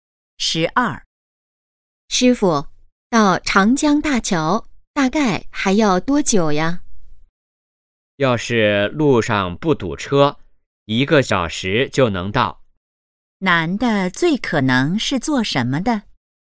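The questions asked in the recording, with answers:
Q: 男的最可能是做什么的?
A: 司机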